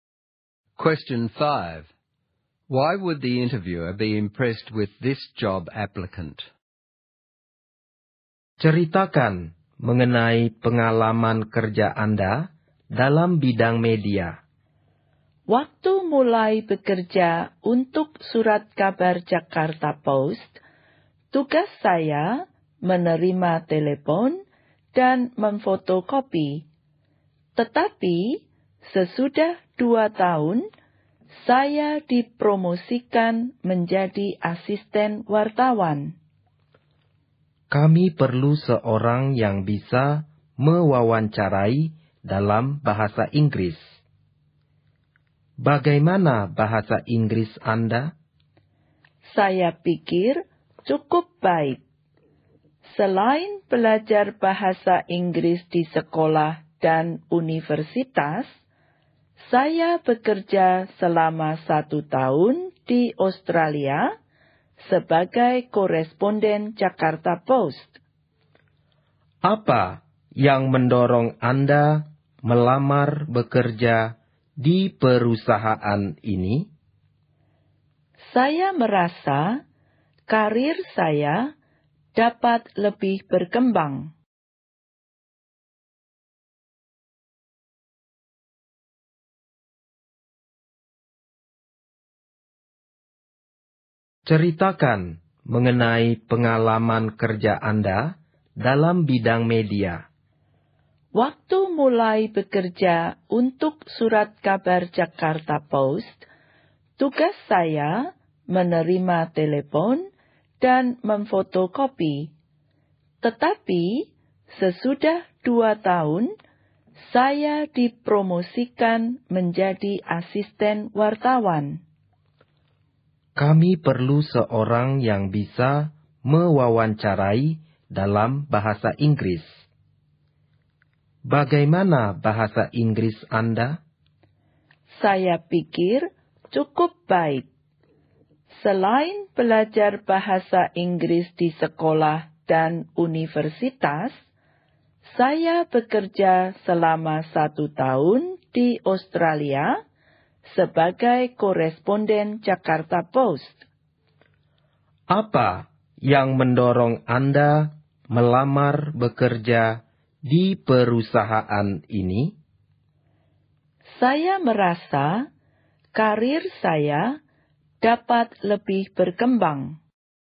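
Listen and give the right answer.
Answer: She has media experience, was promoted to assistant journalist, and has good English from study and a year working in Australia as a correspondent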